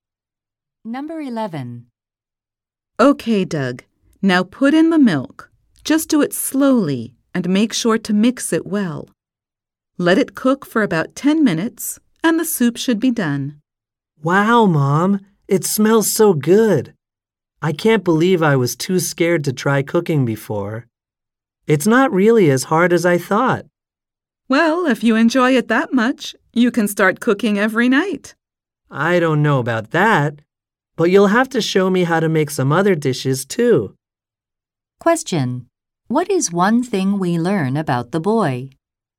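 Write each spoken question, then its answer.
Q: What is one thing we learn about the boy?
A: He is cooking (soup) for the first time; he used to be too scared to try cooking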